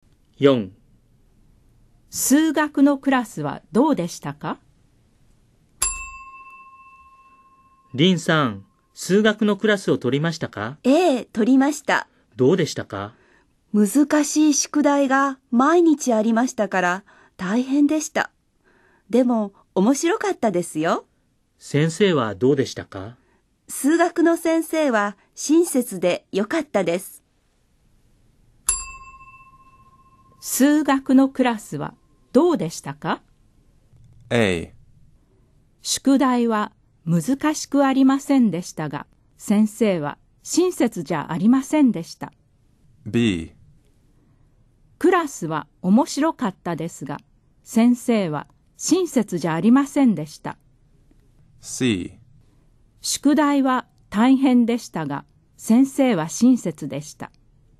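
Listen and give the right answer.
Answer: C: 宿題は大変でしたが、先生は親切でした。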